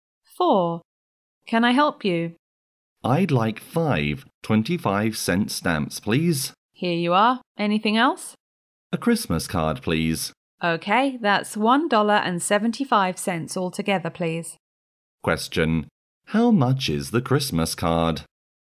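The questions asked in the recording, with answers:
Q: how much is the Christmas card?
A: 50 cents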